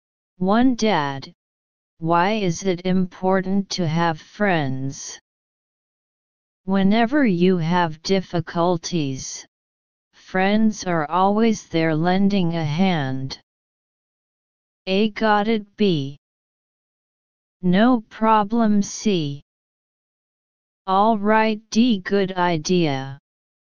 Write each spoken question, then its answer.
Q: Dad, why is it important to have friends?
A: Answer A.